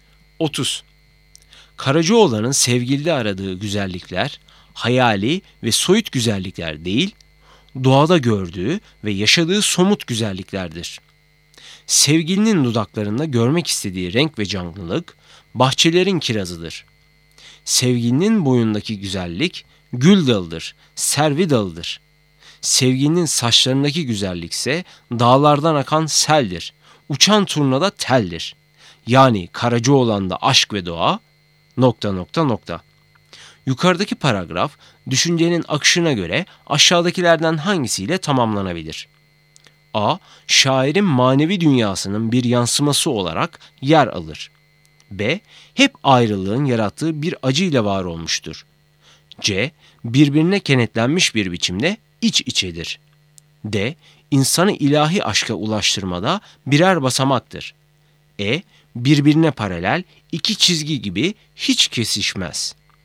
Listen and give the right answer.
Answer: Doğru cevap C. Birbirine kenetlenmiş bir biçimde iç içedir.